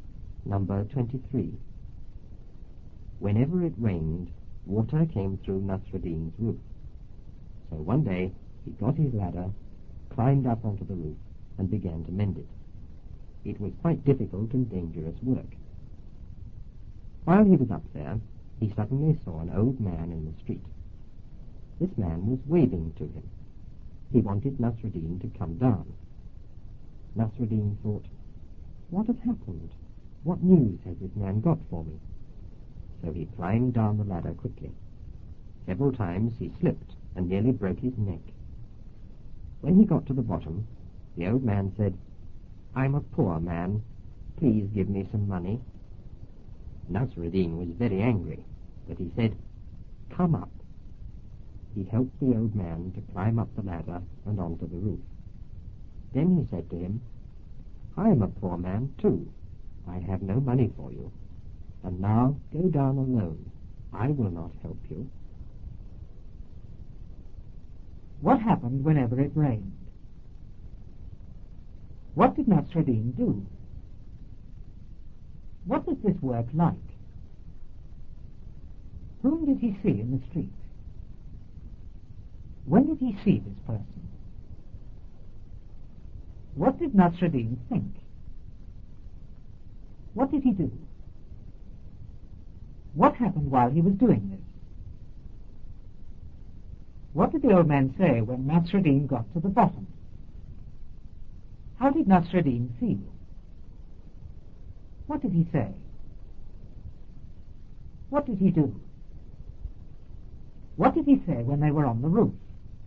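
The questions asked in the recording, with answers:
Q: What happened whenever it rained?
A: Water came through Nasruddin's roof.

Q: What did Nasruddin do?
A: He climbed onto the roof with his ladder and began to mend it.

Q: What was this work like?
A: Quite difficult and dangerous.

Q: Whom did he see in the street?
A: An old man.

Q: When did he see this person?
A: While he was up on the roof.

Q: What did Nasruddin think?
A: What has happened? What news has this man got for me?

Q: What did he do?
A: He climbed down the ladder quickly.

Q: What happened while he was doing this?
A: He slipped several times and nearly broke his neck.

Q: What did the old man say when Nasruddin got to the bottom?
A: I'm a poor man. Please give me some money.

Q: How did Nasruddin feel?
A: Very angry.

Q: What did he say?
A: Come up.

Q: What did he do?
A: He helped the old man climb up the ladder onto the roof.

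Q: What did he say when they were on the roof?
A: I am a poor man too. I have no money for you. Now go down alone; I will not help you.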